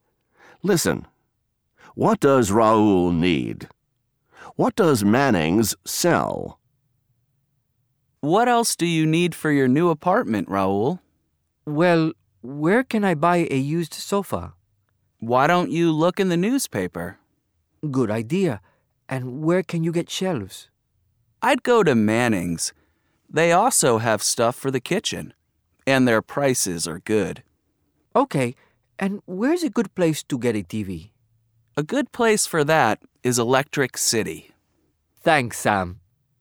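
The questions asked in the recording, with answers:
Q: What does Raoul need?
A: A used sofa, shelves, and a TV

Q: What does Manning's sell?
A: Shelves and stuff for the kitchen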